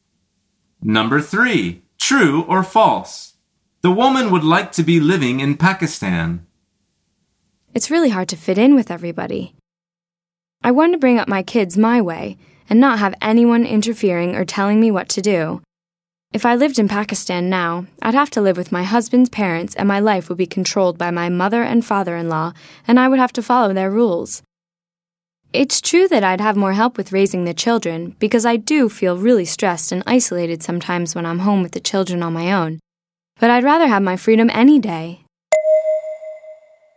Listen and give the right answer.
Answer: The answer is false.